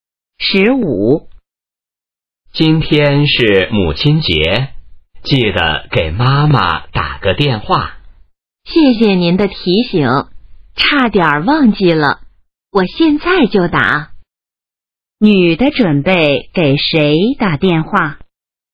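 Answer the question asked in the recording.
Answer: 妈妈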